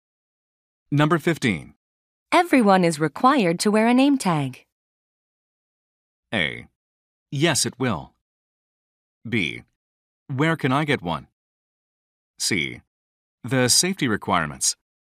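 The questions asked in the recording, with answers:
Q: Everyone is required to wear a name tag.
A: B: Where can I get one?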